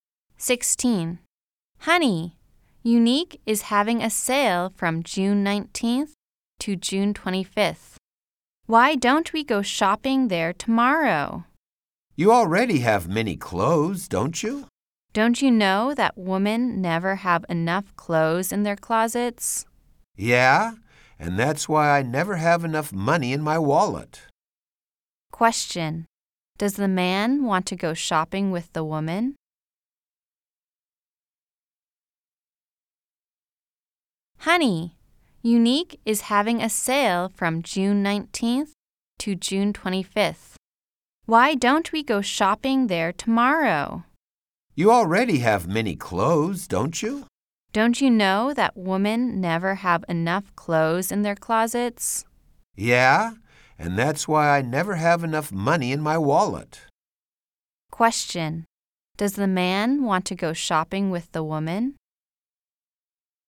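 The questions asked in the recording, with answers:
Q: Question. Does the man want to go shopping with the woman?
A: No, he doesn't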